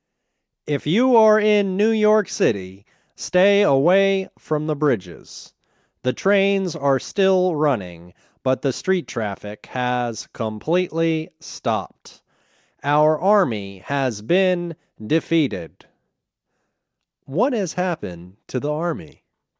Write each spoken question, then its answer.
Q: What has happened to the army?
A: The army has been defeated.